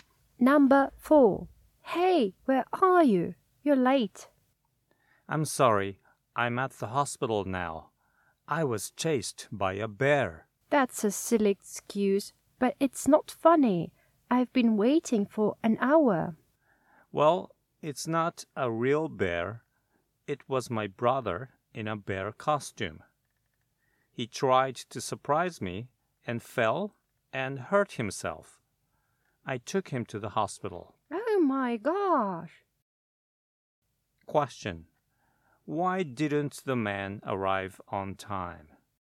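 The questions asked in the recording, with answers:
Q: Why didn't the man arrive on time?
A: He took his brother to the hospital after he fell and got hurt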